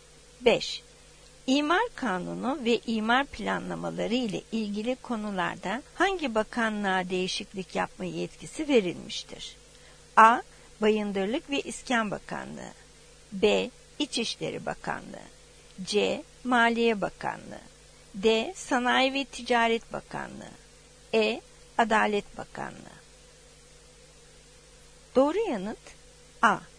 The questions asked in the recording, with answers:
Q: İmar kanunu ve imar planlamaları ile ilgili konularda hangi bakanlığa değişiklik yapma yetkisi verilmiştir?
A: Doğru yanıt A. Bayındırlık ve İskan Bakanlığı.